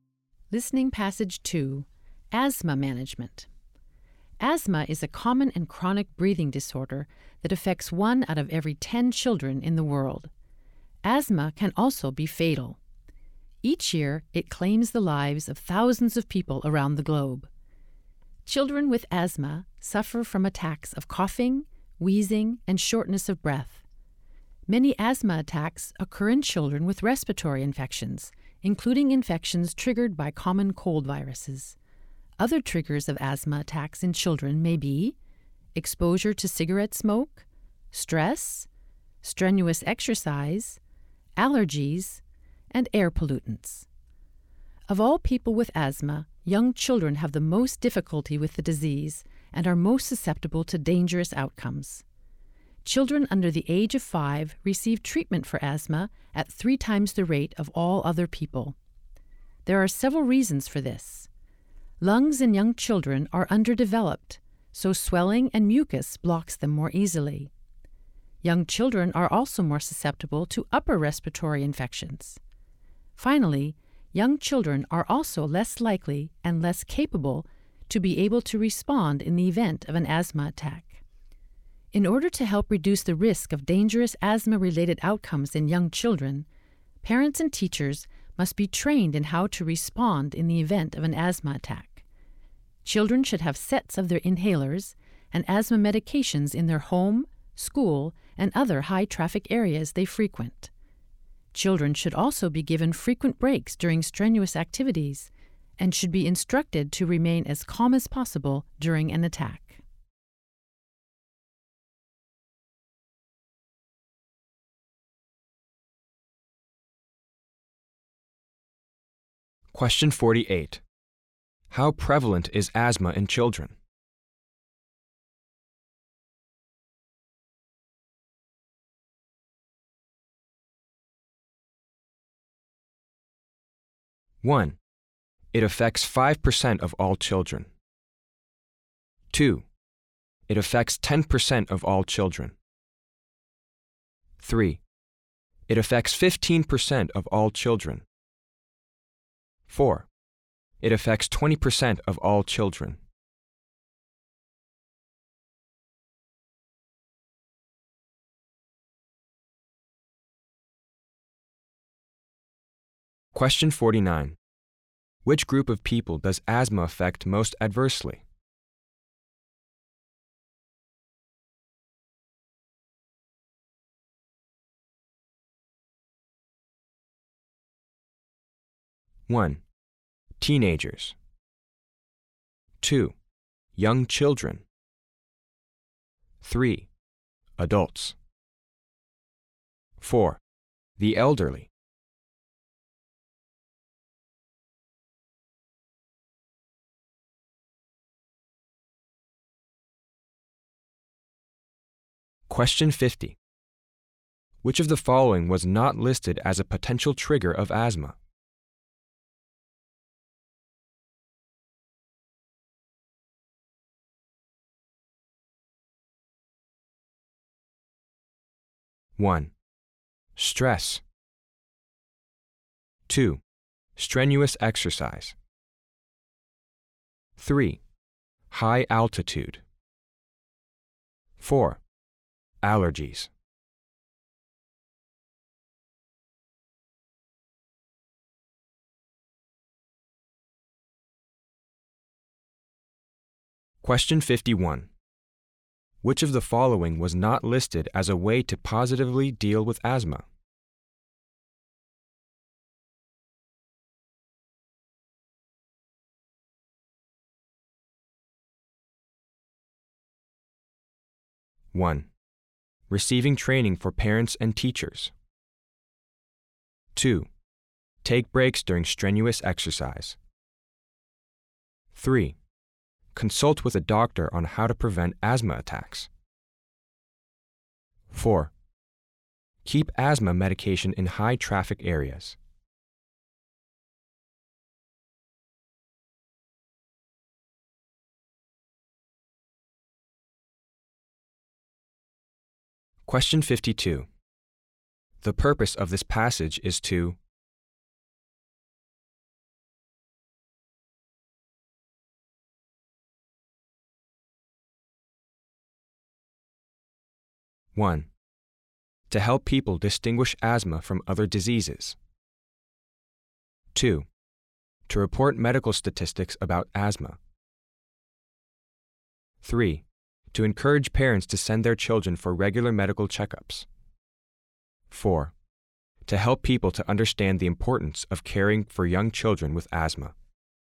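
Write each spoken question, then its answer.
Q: How prevalent is asthma in children?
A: 2: it affects 10% of all children.

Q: Which group of people does asthma affect most adversely?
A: 2: young children.

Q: Which of the following was not listed as a potential trigger of asthma?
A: 3: high altitude.

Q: Which of the following was not listed as a way to positively deal with asthma?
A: 3: consult with a doctor on how to prevent asthma attacks.

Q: The purpose of this passage is to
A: 4: To help people to understand the importance of caring for young children with asthma.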